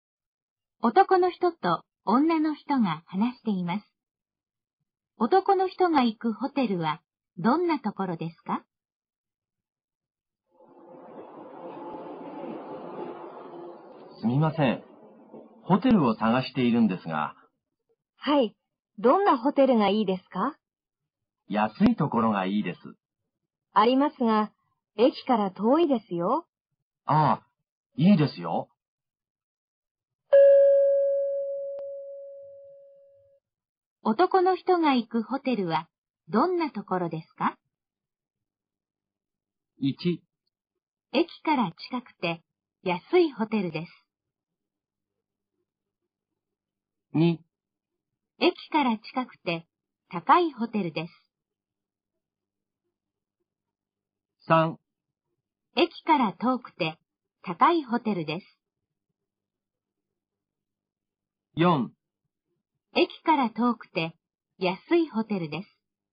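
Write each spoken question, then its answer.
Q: 男の人が行くホテルはどんなところですか?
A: 4: 駅から遠くて安いホテルです。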